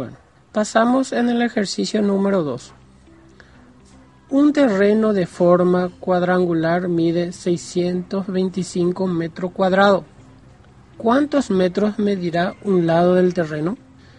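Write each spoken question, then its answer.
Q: ¿Cuántos metros medirá un lado del terreno?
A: 25 metros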